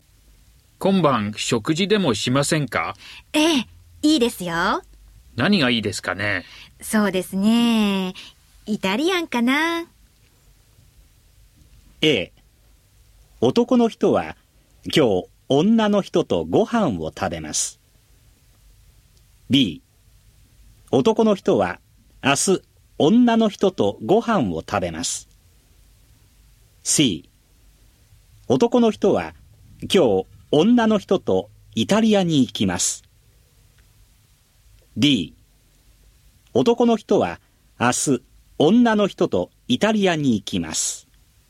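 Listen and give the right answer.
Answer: A: 男の人は今日女の人とご飯を食べます。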